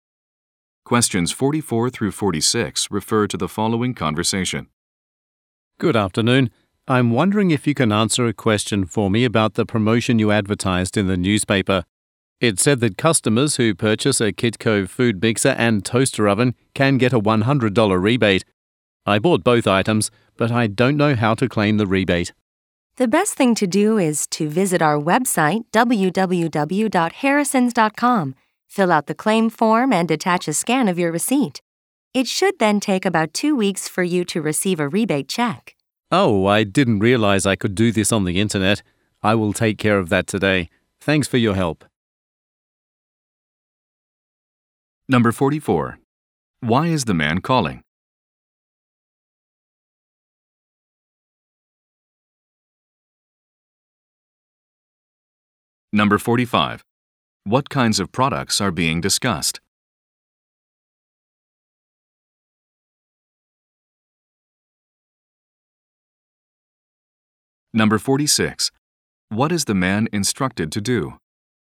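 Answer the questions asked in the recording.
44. To ask how to claim a rebate
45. Kitchen appliances
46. Fill out a claim form on the website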